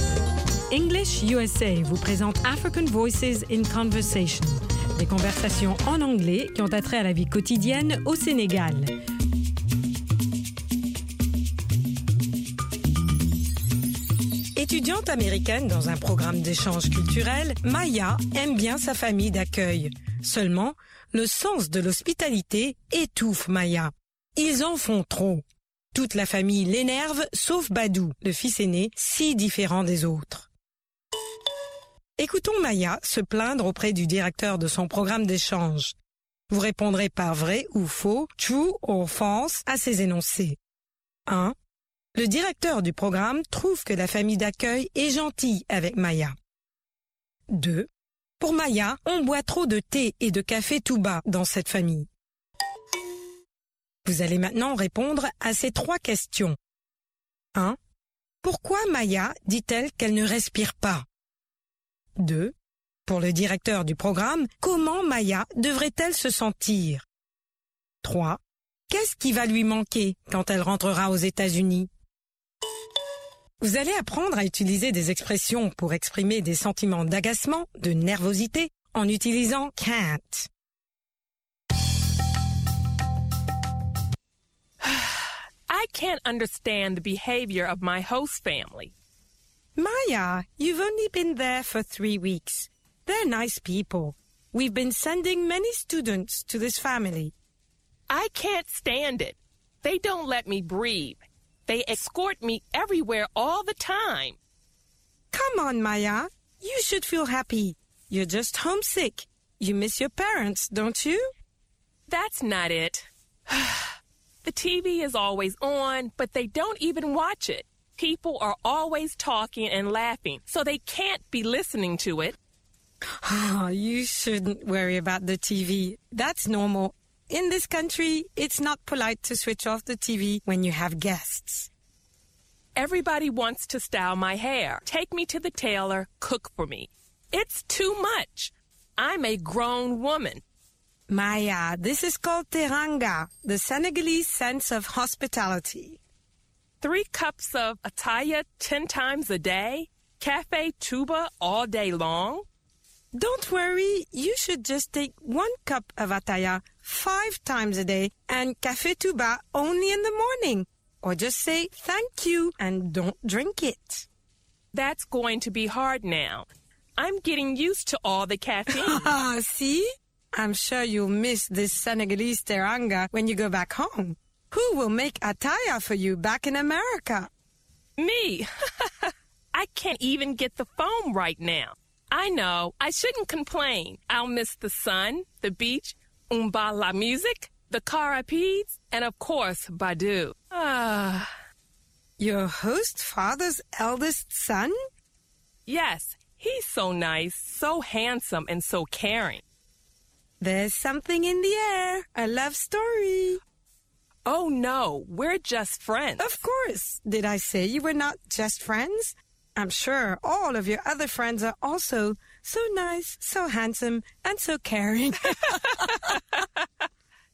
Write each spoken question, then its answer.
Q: Le directeur du programme trouve que la famille d'accueil est gentille avec Maya.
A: L'énoncé 1 est vrai.

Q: Pour Maya, on boit trop de thé et de café tout bas dans cette famille.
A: L'énoncé 2 est vrai.

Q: Pourquoi Maya dit-elle qu'elle ne respire pas?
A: Parce qu'on l'escorte toujours, partout.

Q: Pour le directeur du programme, comment Maya devrait-elle se sentir?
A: Heureuse.